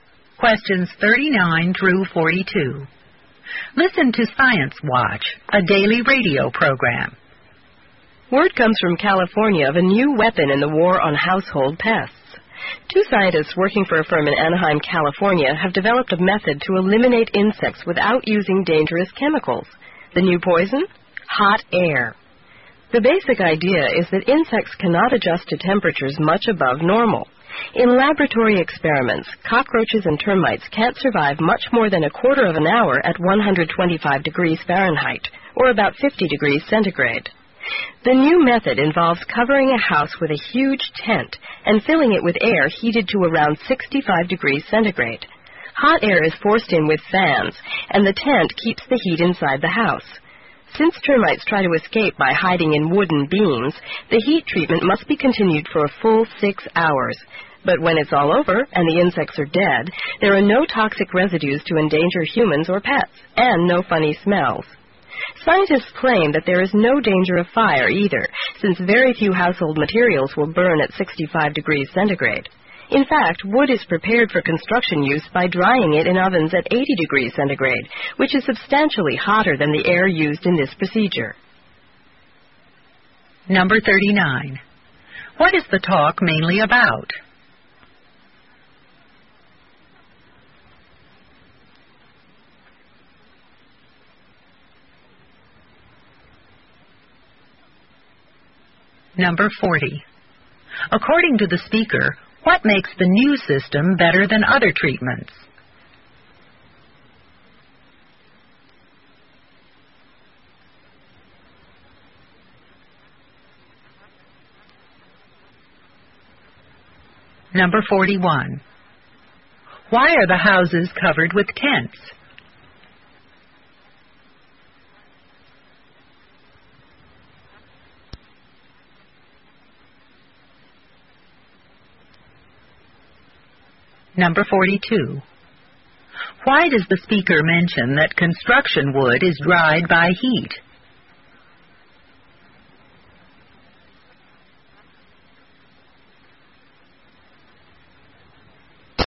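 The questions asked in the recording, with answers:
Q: What is the talk mainly about?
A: A new method of killing household insects with hot air

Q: According to the speaker, what makes the new system better than other treatments?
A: It uses no dangerous chemicals, so it leaves no toxic residues or smells

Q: Why are the houses covered with tents?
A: To keep the hot air inside the house

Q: Why does the speaker mention that construction wood is dried by heat?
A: To show the method is not a fire danger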